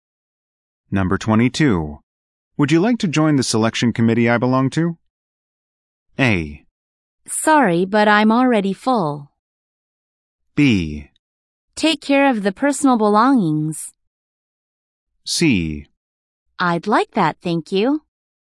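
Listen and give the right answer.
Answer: C: I'd like that, thank you.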